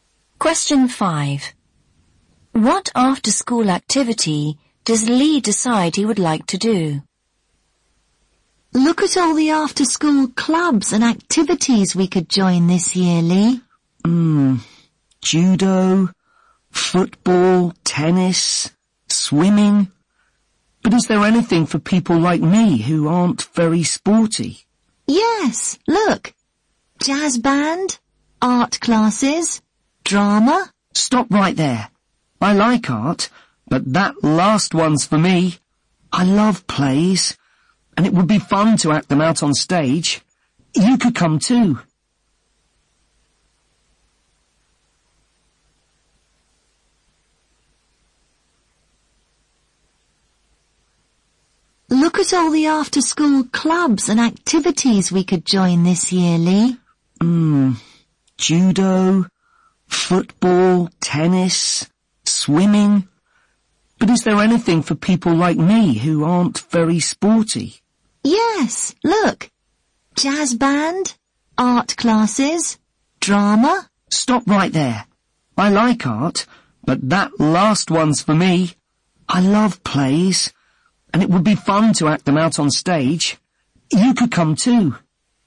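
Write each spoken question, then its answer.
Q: What after-school activity does Lee decide he would like to do?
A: Drama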